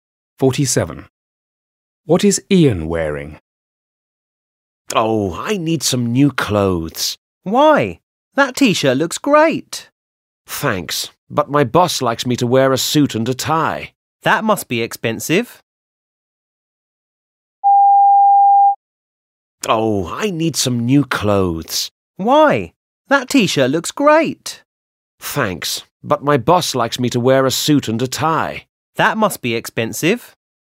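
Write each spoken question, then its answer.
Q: What is Ian wearing?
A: a t-shirt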